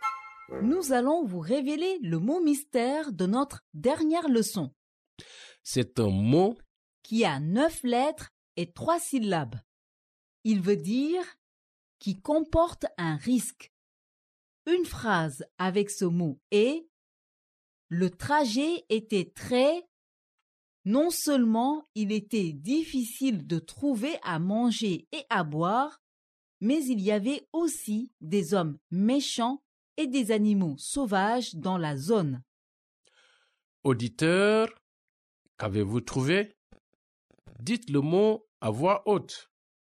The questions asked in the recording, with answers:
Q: Auditeur, qu'avez-vous trouvé?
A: Le mot mystère d'aujourd'hui est dangereux.